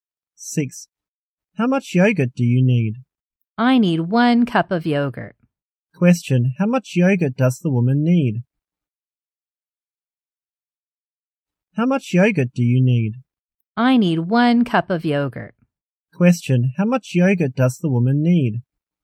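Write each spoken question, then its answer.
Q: How much yogurt does the woman need?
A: 1 cup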